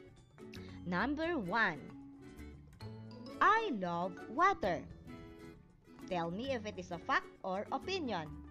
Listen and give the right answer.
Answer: Correct, it is an opinion.